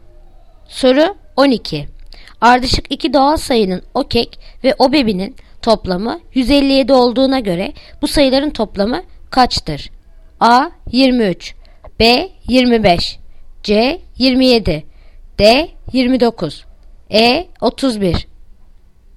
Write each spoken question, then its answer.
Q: Ardışık iki doğal sayının okek ve obebinin toplamı 157 olduğuna göre bu sayıların toplamı kaçtır?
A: Yanıt Bursa. 25.